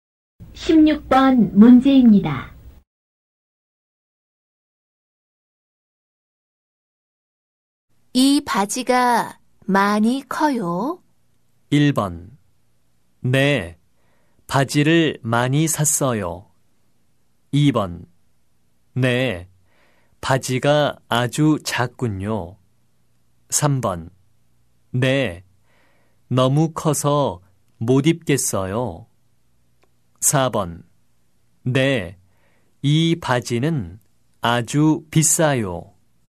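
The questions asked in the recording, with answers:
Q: 이 바지가 많이 커요?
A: 3: 네, 너무 커서 못 입겠어요.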